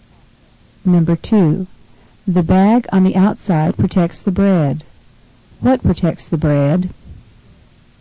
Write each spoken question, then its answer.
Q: What protects the bread?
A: Number 2 is C, the outer bag.